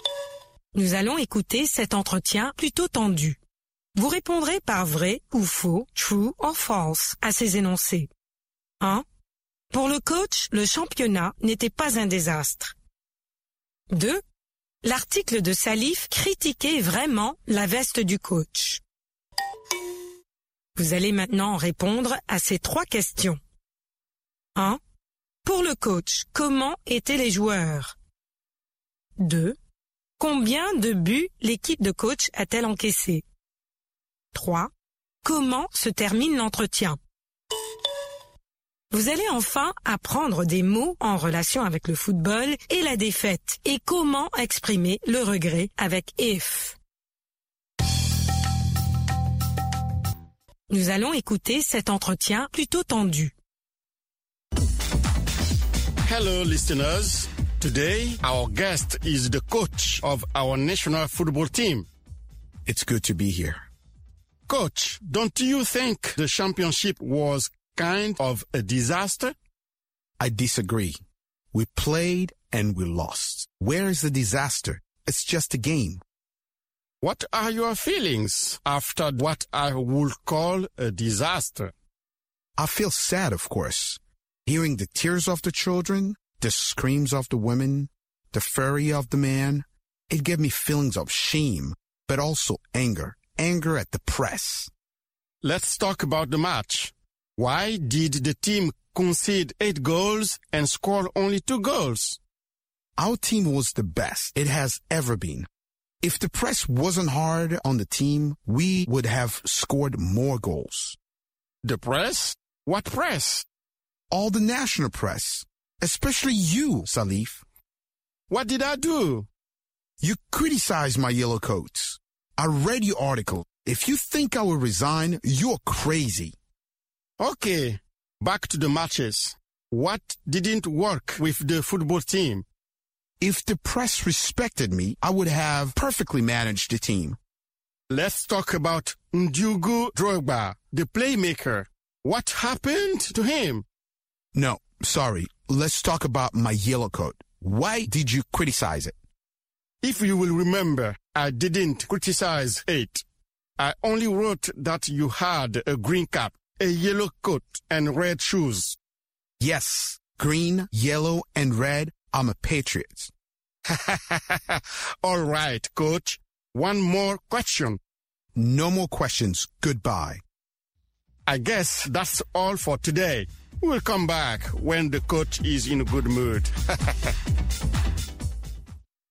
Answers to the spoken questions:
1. L'énoncé 1 est vrai.
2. L'énoncé 2 est faux.
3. Ils étaient les meilleurs.
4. 8 buts.
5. Le coach l'arrête.